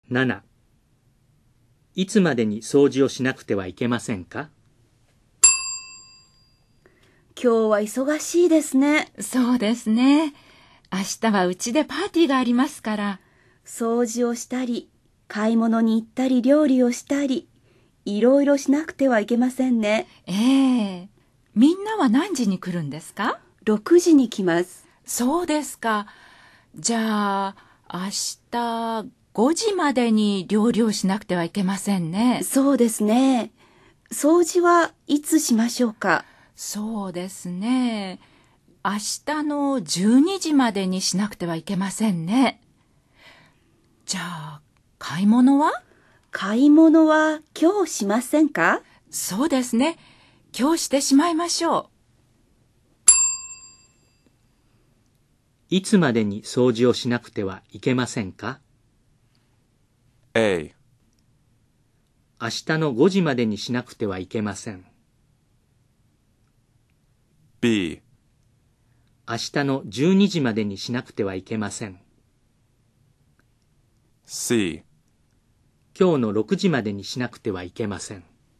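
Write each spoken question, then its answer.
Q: いつまでに掃除をしなくてはいけませんか?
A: B: 明日の12時までにしなくてはいけません。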